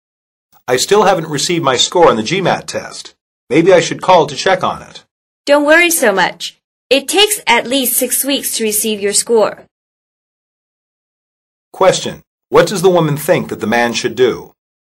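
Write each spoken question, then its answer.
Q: What does the woman think that the man should do?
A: Wait for his score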